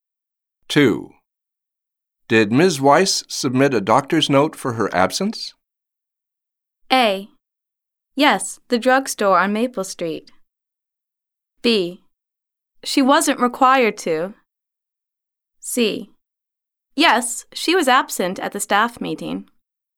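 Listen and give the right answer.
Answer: B: She wasn't required to.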